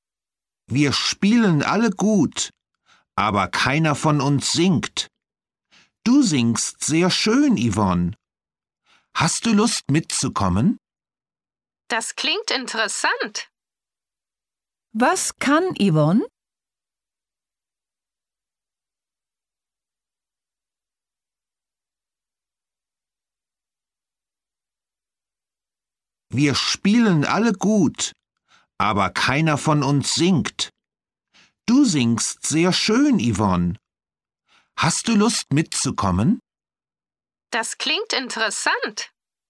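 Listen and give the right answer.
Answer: Sie singt sehr schön (singen)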